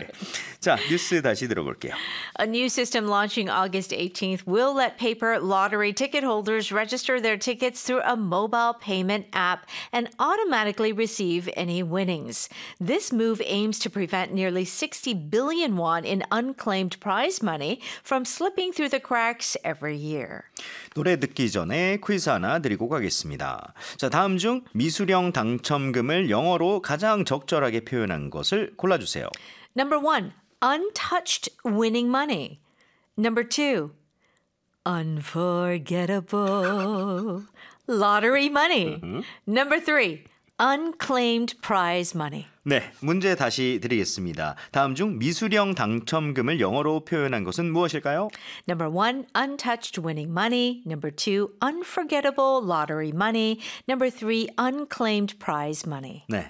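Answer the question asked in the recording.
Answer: 3: unclaimed prize money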